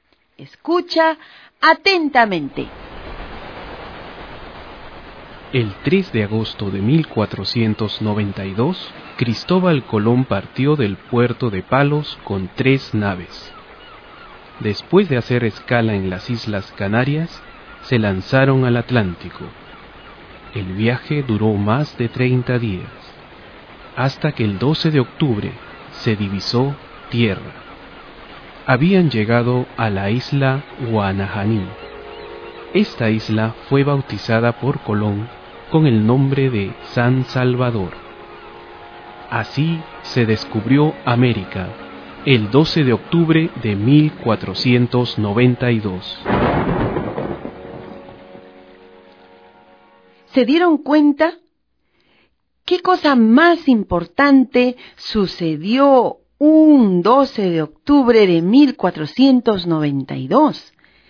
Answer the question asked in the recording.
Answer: El descubrimiento de América.